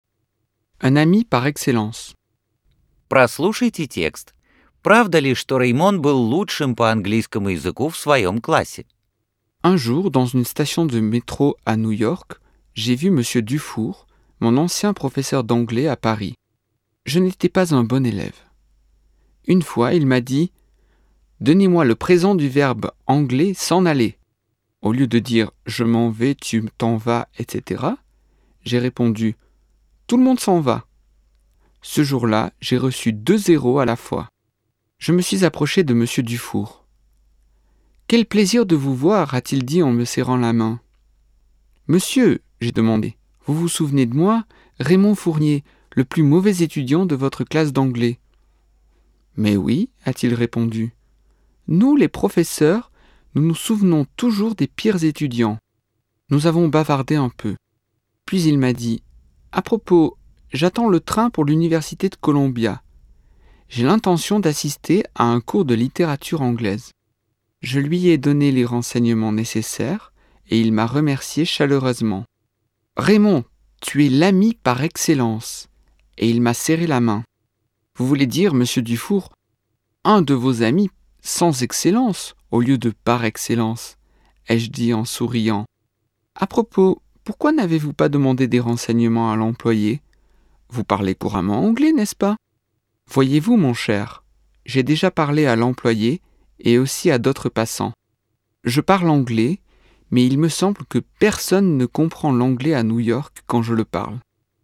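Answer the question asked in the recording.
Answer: Нет, он был худшим учеником в классе английского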